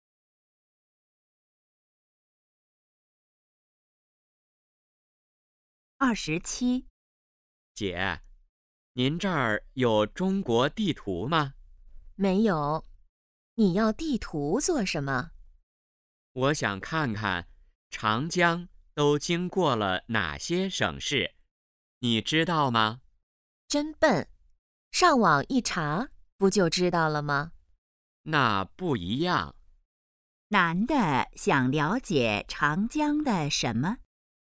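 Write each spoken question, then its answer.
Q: 男的想了解长江的什么?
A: 经过哪些省市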